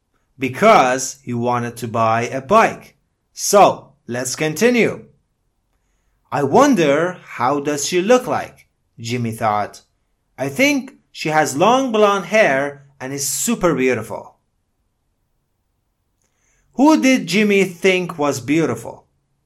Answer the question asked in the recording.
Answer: Jimmy thought the girl was beautiful.